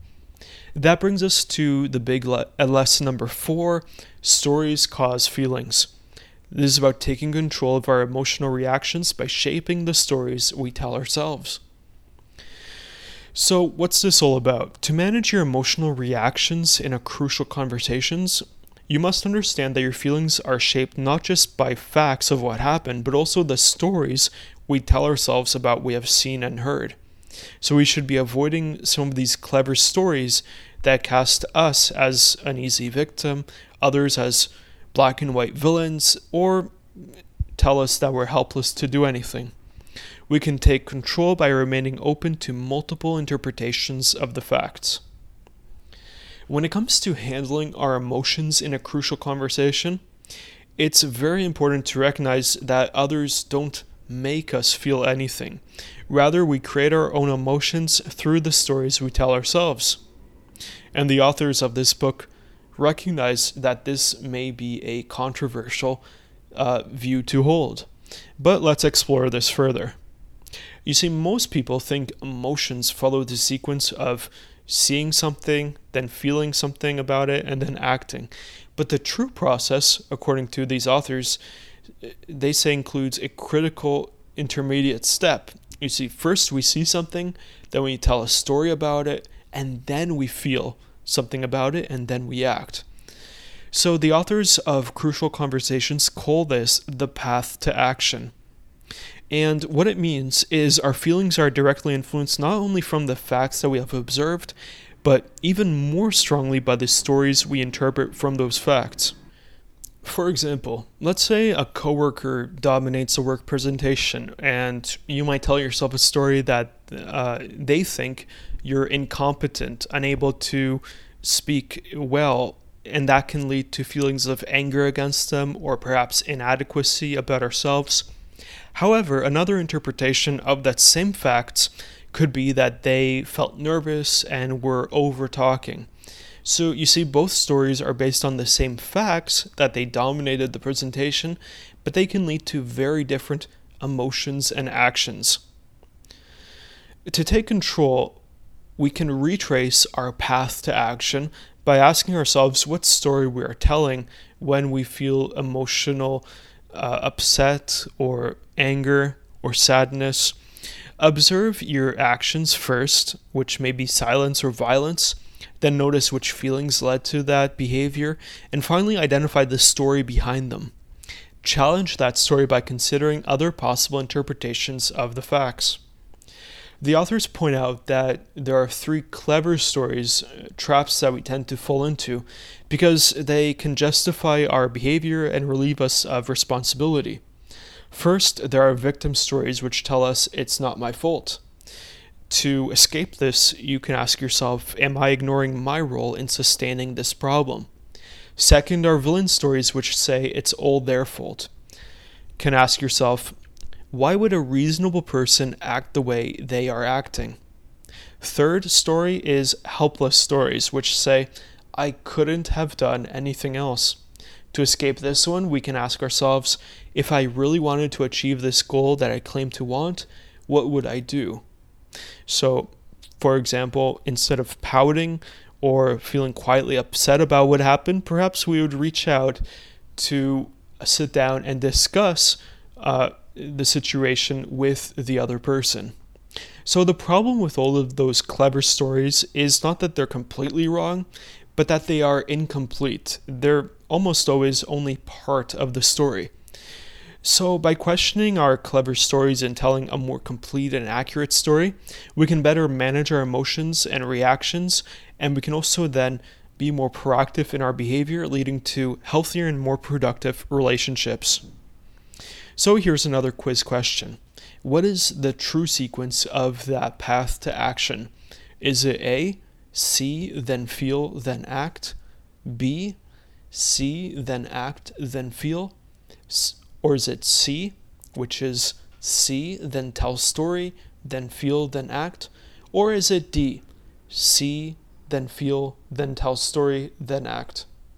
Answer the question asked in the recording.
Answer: So the correct sequence here is C, which begins with seeing, then telling a story, and then feeling and acting.